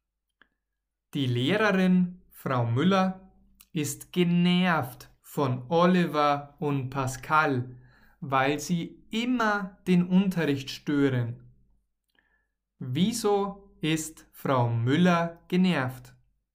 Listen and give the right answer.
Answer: weil Oliver und Pascal immer den Unterricht stören.